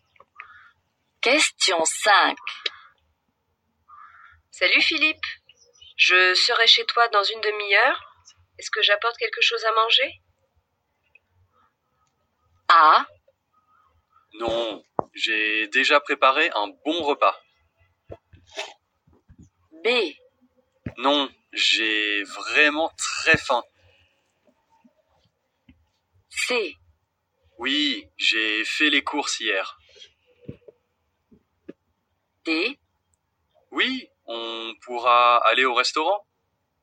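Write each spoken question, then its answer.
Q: Est-ce que j'apporte quelque chose à manger?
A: A: Non, j'ai déjà préparé un bon repas.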